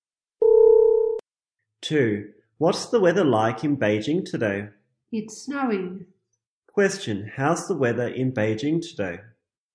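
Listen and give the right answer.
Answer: It's snowing.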